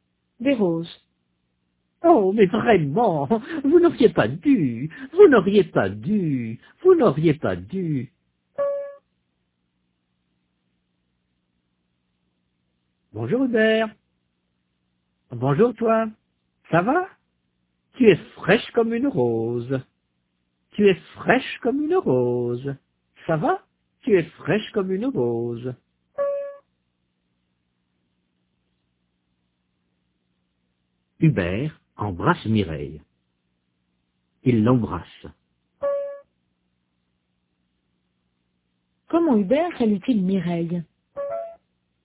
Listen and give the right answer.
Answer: Il l'embrasse.